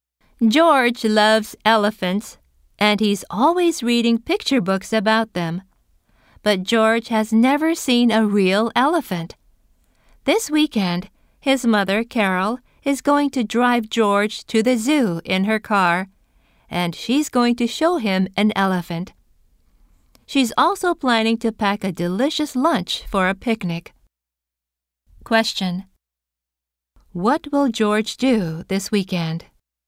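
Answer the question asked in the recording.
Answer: Go to the zoo to see an elephant.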